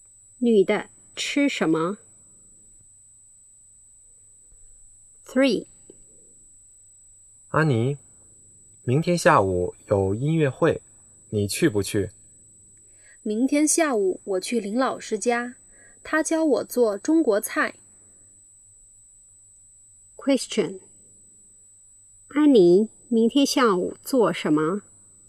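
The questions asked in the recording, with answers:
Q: 安妮明天下午做什么?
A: 去林老师家学做中国菜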